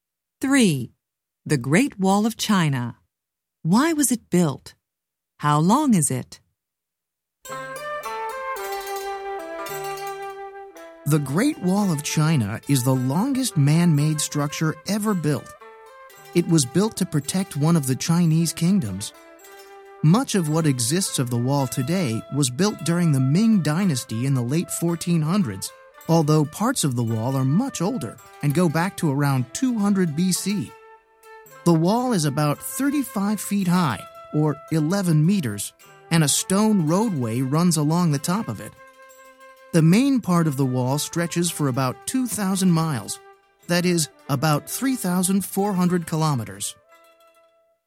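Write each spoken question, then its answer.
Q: Why was it built?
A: To protect one of the Chinese kingdoms

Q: How long is it?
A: About 2,000 miles (3,400 kilometers)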